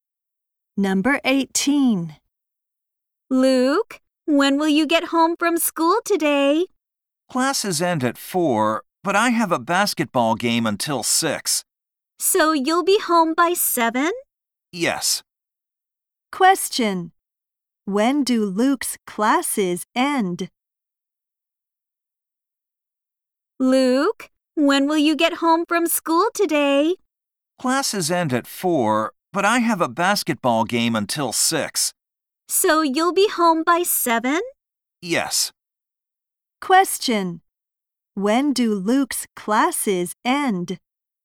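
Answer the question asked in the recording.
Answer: At 4.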